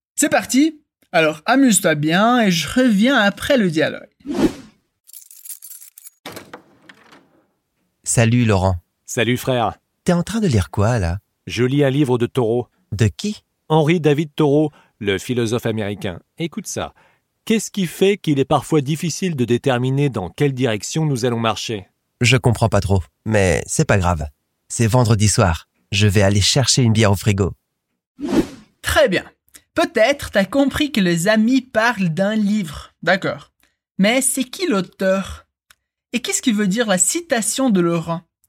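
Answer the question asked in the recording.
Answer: Henri David Thoreau, le philosophe américain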